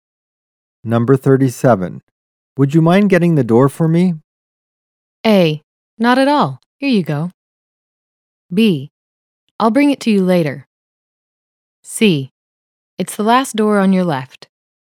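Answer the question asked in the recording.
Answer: A: Not at all. Here you go.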